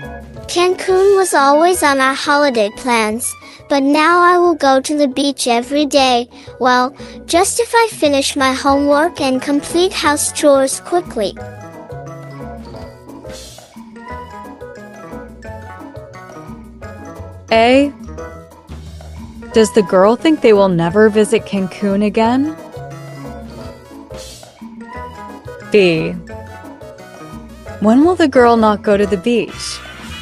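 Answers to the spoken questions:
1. No, she will live there and go to the beach every day
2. When she doesn't finish her homework and house chores quickly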